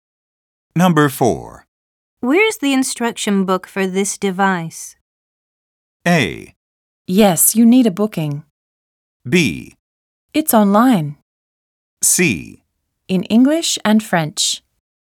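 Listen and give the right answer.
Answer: B: It's online.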